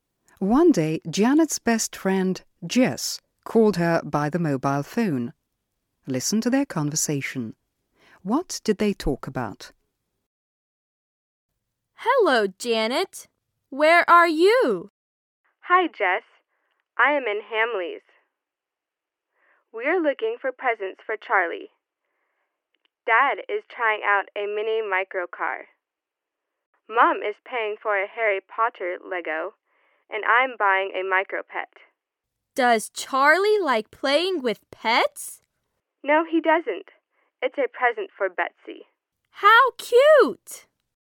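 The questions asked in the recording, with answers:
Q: What did they talk about?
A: Janet shopping for presents at Hamleys (for Charlie, and a micro pet for Betsy)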